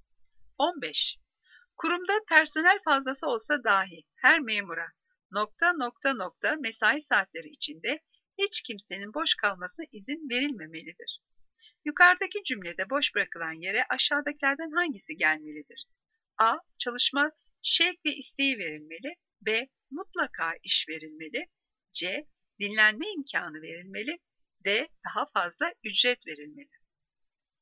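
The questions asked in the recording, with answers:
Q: Kurumda personel fazlası olsa dahi her memura ...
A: B: Mutlaka iş verilmeli.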